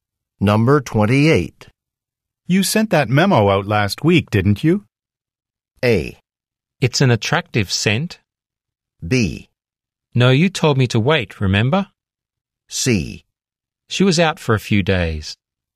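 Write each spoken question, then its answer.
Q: You sent that memo out last week, didn't you?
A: B: No, you told me to wait, remember?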